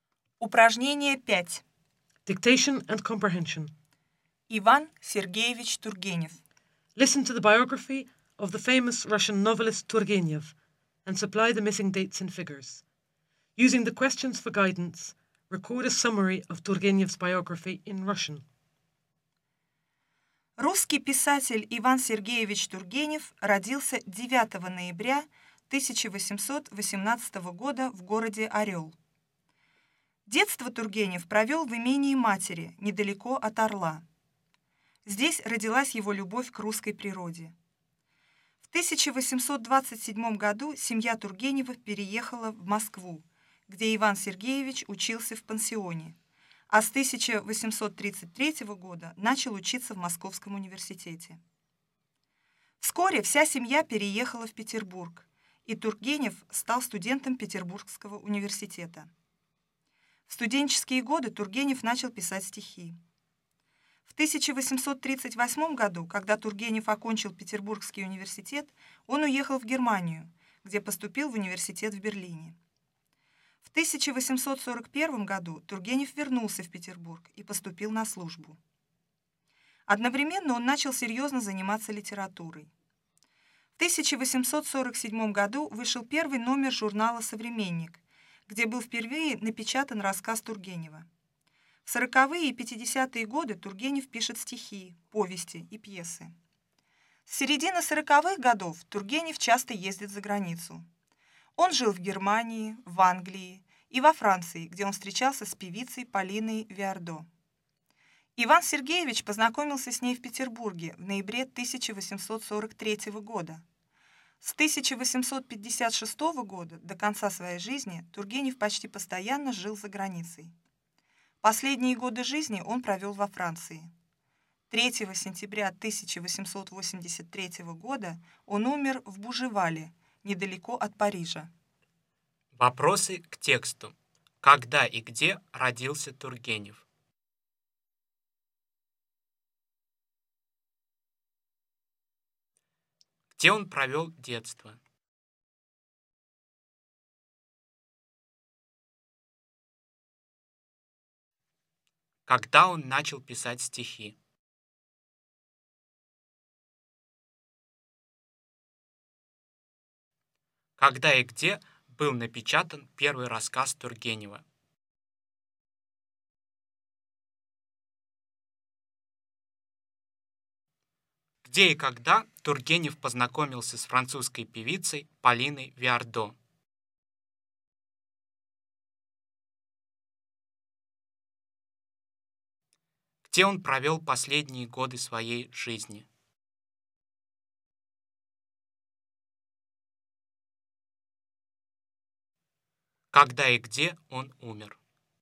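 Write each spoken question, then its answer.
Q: Когда и где родился Тургенев?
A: 9 ноября 1818 года в городе Орел

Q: Где он провел детство?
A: В имении матери, недалеко от Орла

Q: Когда он начал писать стихи?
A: В студенческие годы

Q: Когда и где был напечатан первый рассказ Тургенева?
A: В 1847 году в журнале «Современник»

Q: Где и когда Тургенев познакомился с французской певицей Полиной Виардо?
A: В Петербурге в ноябре 1843 года

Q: Где он провел последние годы своей жизни?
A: Во Франции

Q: когда и где он умер.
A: 3 сентября 1883 года в Буживале, недалеко от Парижа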